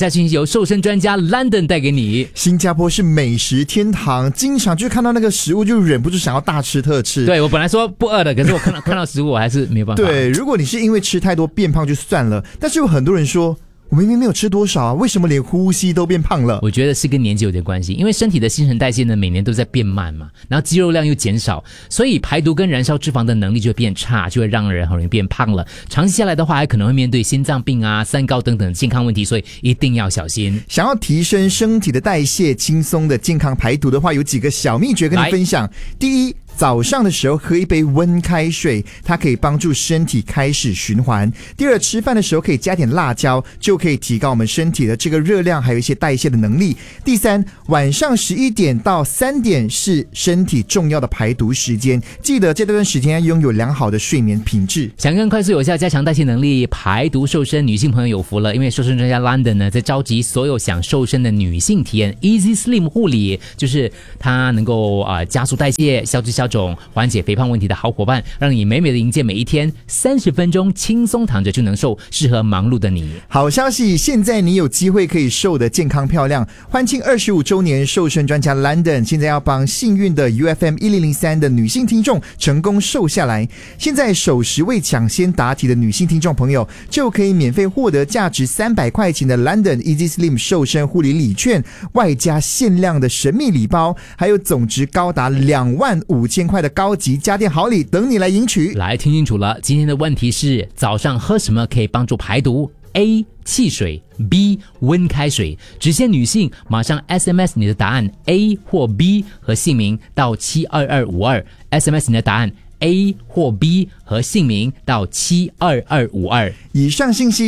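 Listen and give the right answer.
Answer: B: 温开水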